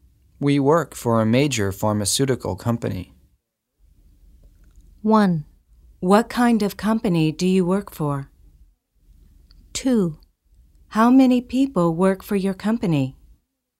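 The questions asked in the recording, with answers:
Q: We work for a major pharmaceutical company.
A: 1: What kind of company do you work for?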